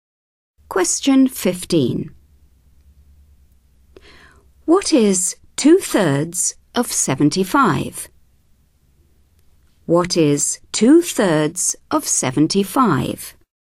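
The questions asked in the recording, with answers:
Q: What is 2/3 of 75?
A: 50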